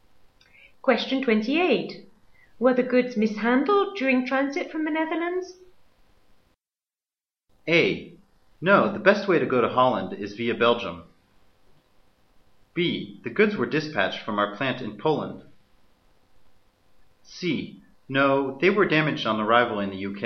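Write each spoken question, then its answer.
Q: Were the goods mishandled during transit from the Netherlands?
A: C: No, they were damaged on arrival in the UK.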